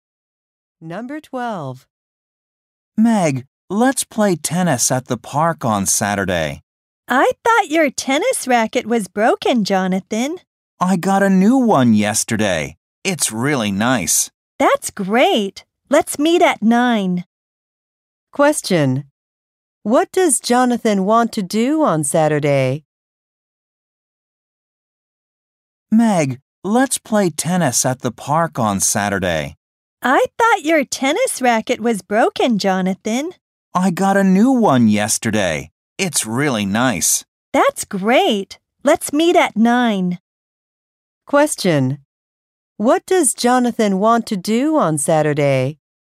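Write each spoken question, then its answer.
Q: What does Jonathan want to do on Saturday?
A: Play tennis at the park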